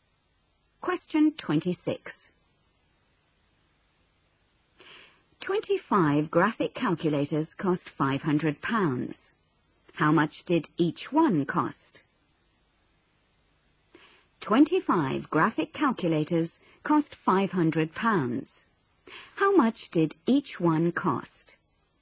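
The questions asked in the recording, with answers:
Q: How much did each one cost?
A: £20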